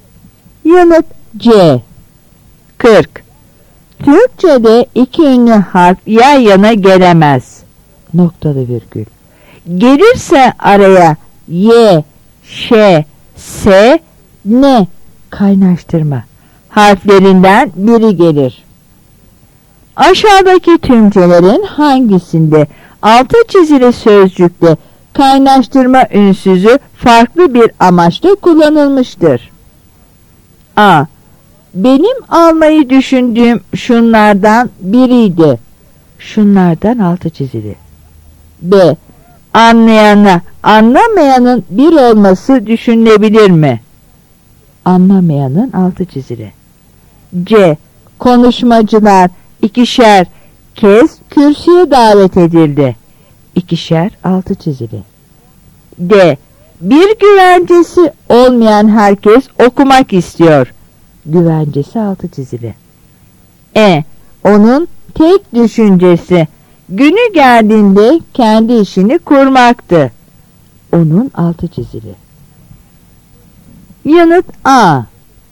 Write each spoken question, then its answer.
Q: Aşağıdaki tümcelerin hangisinde altı çizili sözcükte kaynaştırma ünsüzü farklı bir amaçla kullanılmıştır?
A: Yanıt A.